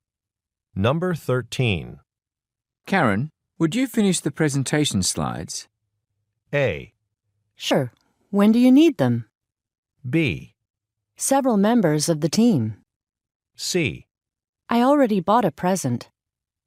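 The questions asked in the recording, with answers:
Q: Karen, would you finish the presentation slides?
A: A: Sure. When do you need them?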